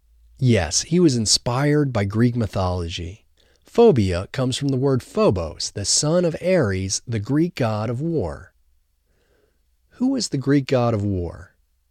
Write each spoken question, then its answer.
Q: Who was the Greek god of war?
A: Ares was the Greek god of war.